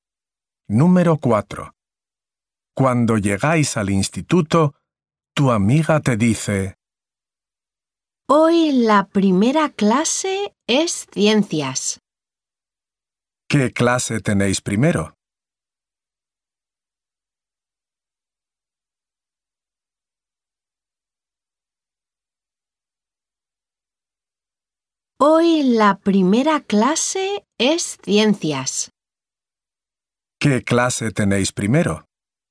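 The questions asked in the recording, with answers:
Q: ¿Qué clase tenéis primero?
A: Ciencias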